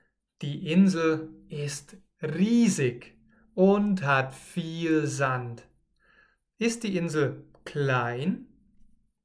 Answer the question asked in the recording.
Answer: Nein, die Insel ist nicht klein.